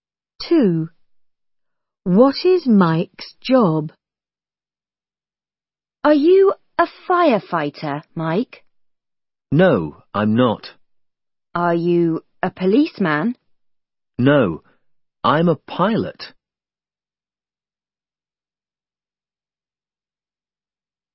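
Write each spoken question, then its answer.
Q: What is Mike's job?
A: a pilot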